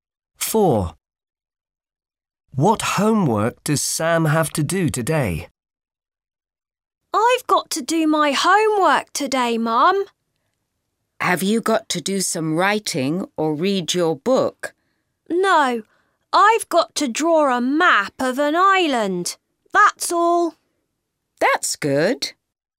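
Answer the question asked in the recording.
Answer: draw a map of an island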